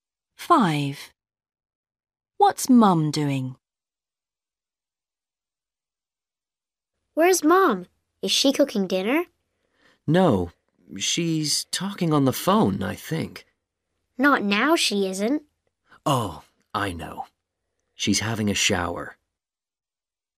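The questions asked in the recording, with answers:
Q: What's Mum doing?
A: having a shower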